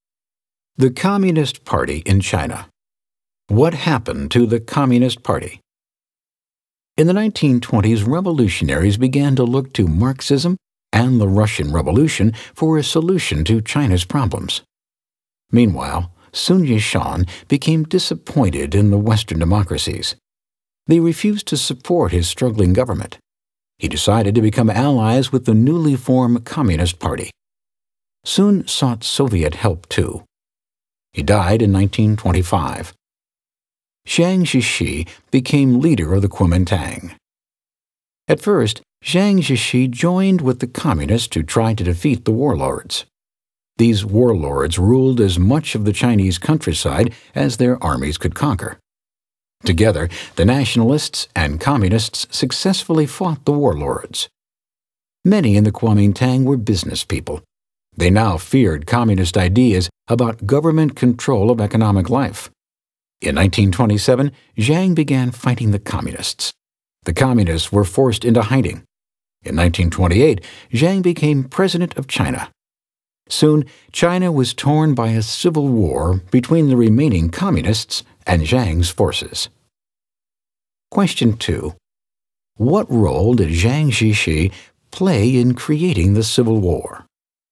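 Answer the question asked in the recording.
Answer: He turned on the Communists and began fighting them in 1927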